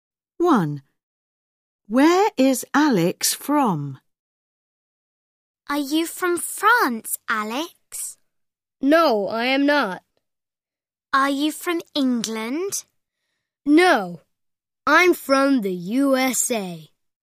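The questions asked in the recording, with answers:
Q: Where is Alex from?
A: the USA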